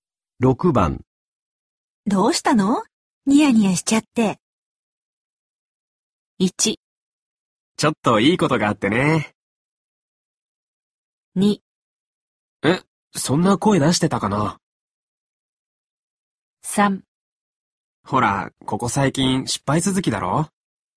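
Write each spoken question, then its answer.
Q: どうしたの?ニヤニヤしちゃって。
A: 1: ちょっといいことがあってね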